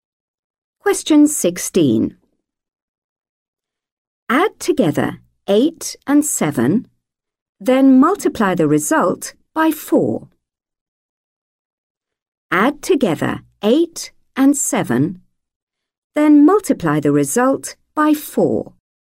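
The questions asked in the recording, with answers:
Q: Add together 8 and 7, then multiply the result by 4.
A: 60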